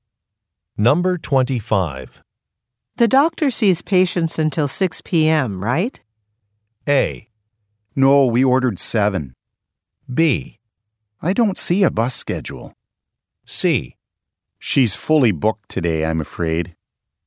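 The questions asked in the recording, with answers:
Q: The doctor sees patients until 6 p.m., right?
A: C: She's fully booked today, I'm afraid.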